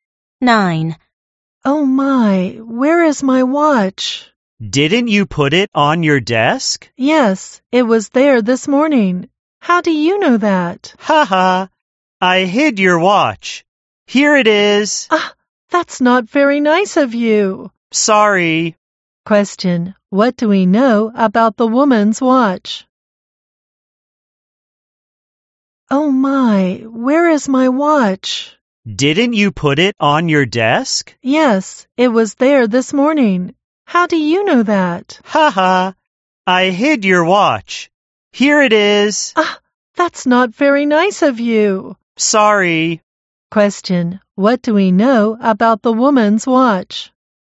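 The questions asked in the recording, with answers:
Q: Question: what do we know about the woman's watch?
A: The other speaker hid it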